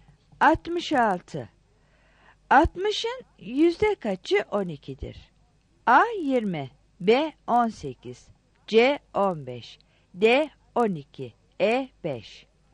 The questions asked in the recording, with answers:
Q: 60'ın yüzde kaçı 12'dir?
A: 66 A